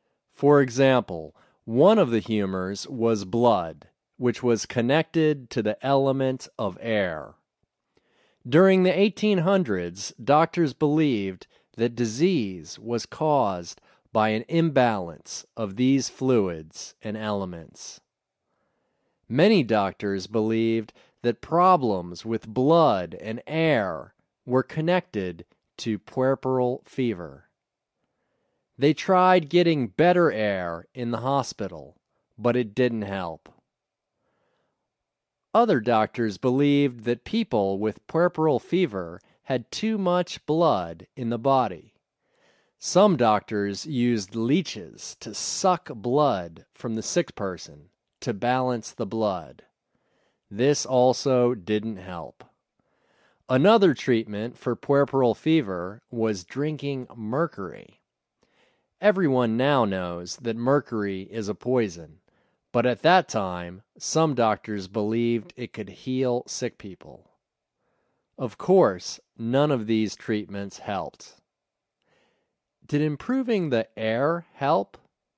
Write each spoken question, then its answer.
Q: Did improving the air help?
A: No. Improving the air didn't help.